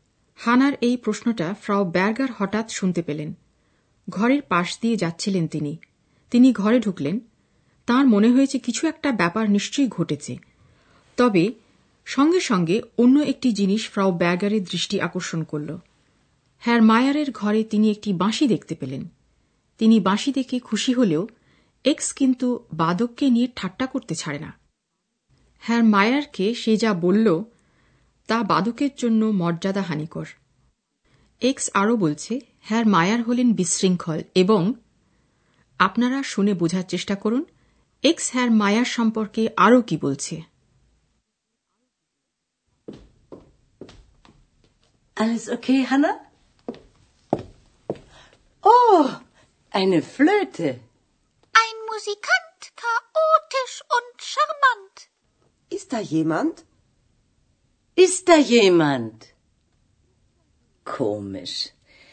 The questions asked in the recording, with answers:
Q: x হ্যার মায়ার সম্পর্কে আরও কি বলছে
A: x হ্যার মায়ারকে আরও বলছে আকর্ষণীয় সাম্মান্ড